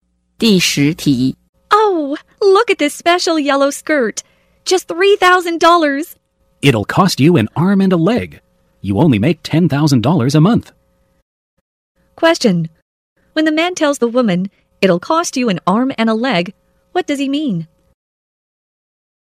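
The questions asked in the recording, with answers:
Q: When the man tells the woman, it'll cost you an arm and a leg, what does he mean?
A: The skirt is too expensive for her.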